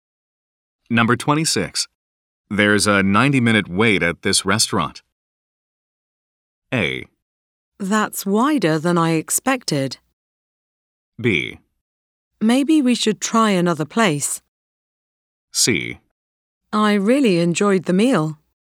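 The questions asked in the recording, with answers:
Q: There's a 90-minute wait at this restaurant.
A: B: Maybe we should try another place.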